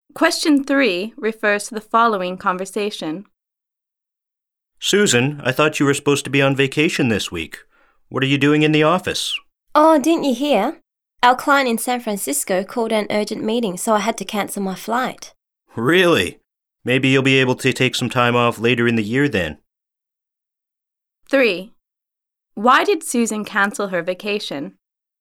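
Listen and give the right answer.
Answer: Her client in San Francisco called an urgent meeting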